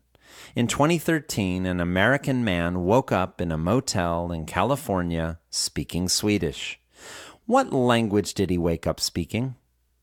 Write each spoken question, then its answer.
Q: What language did he wake up speaking?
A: He woke up speaking Swedish.